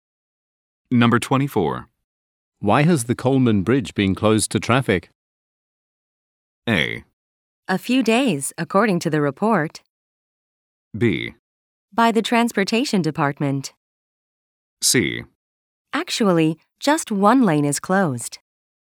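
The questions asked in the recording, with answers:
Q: Why has the Coleman Bridge been closed to traffic?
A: C: Actually, just one lane is closed.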